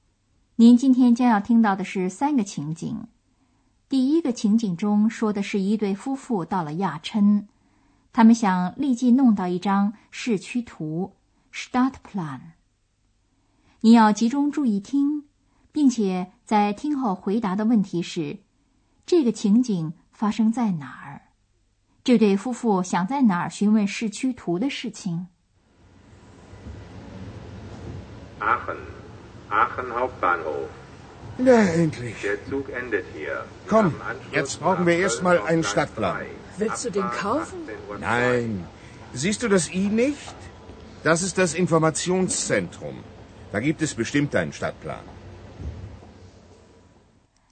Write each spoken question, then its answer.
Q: 这个情景发生在哪儿?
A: 这个情景发生在亚琛火车总站

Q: 这对夫妇想在哪儿询问市区图的事情。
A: 那里也有一个问询中心,在那儿也可以拿到一张小小的市区图